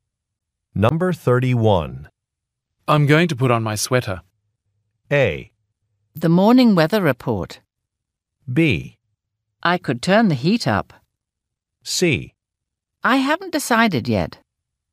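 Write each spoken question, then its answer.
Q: I'm going to put on my sweater.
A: B: I could turn the heat up.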